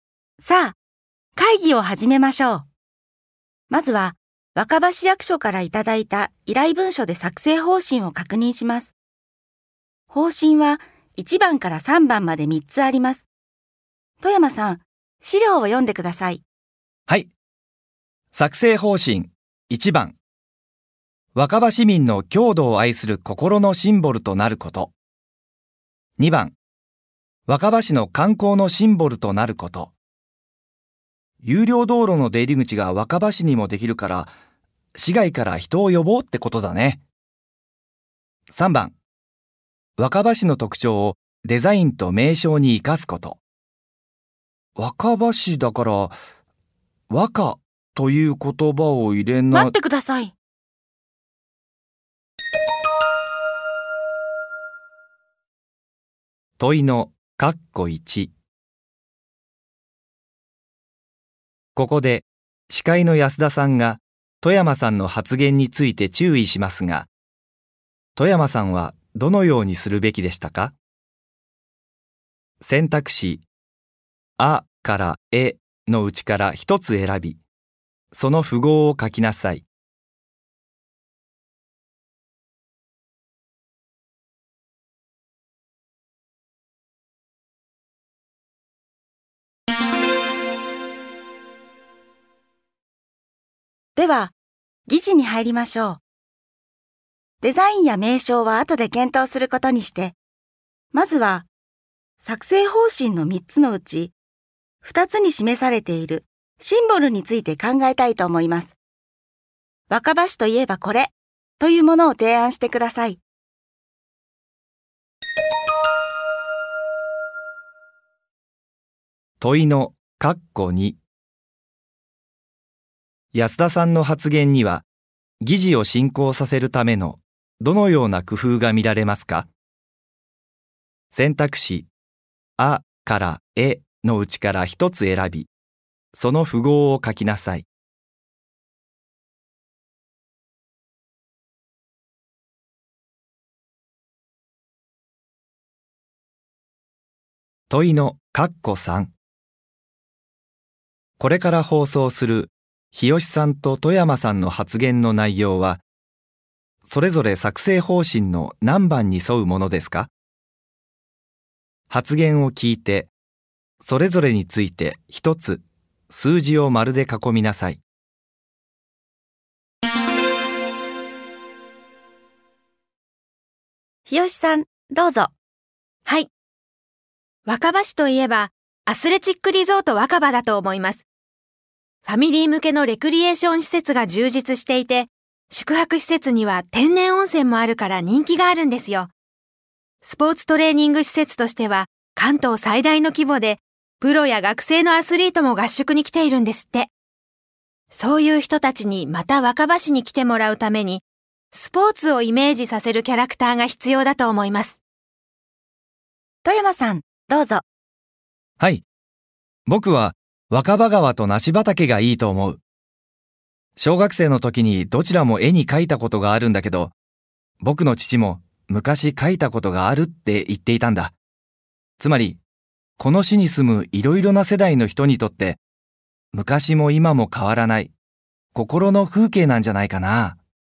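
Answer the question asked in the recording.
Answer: 日吉さん:2番(観光のシンボル)、富山さん:1番(郷土を愛する心のシンボル)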